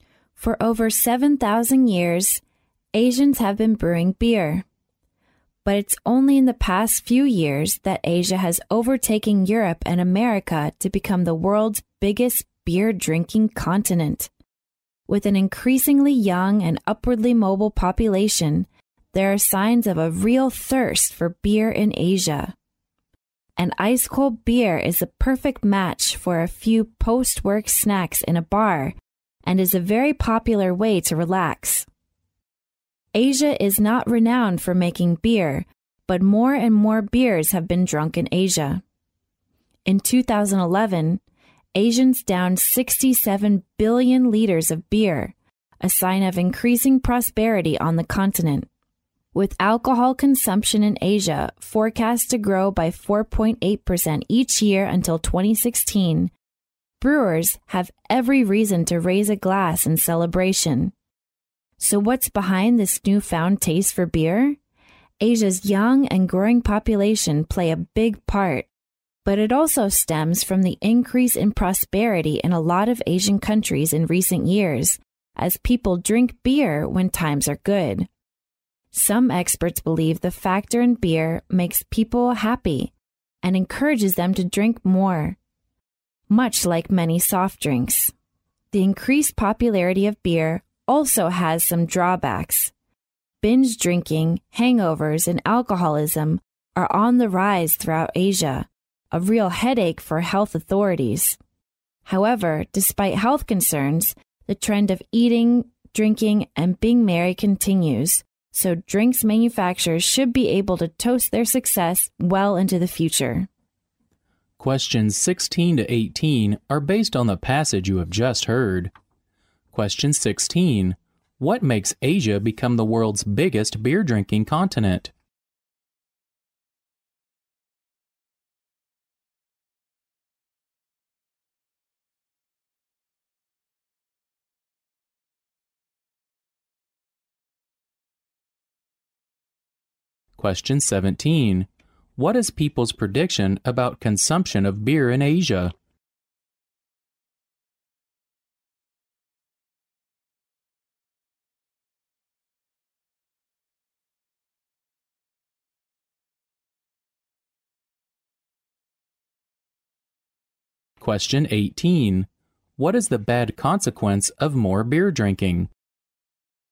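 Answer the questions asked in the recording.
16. Its young and growing population and increasing prosperity
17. It will grow by 4.8% each year until 2016
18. Binge drinking, hangovers and alcoholism are rising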